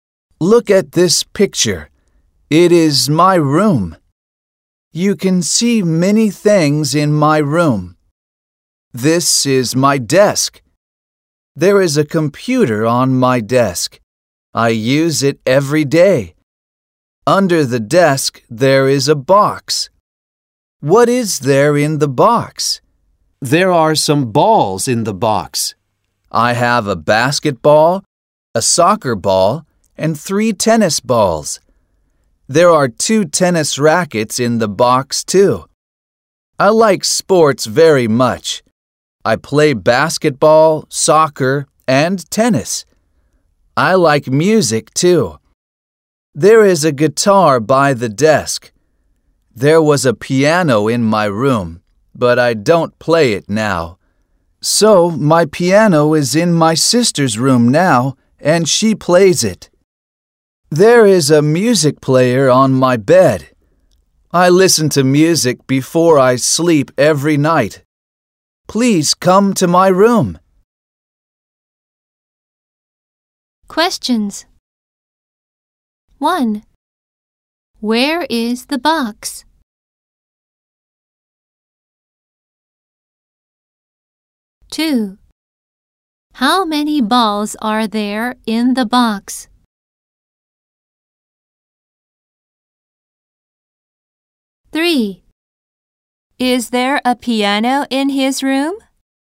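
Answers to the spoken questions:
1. Under the desk.
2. Five.
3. No, there isn't.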